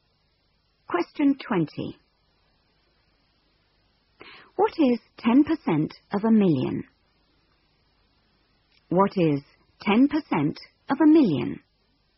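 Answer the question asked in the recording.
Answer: 100,000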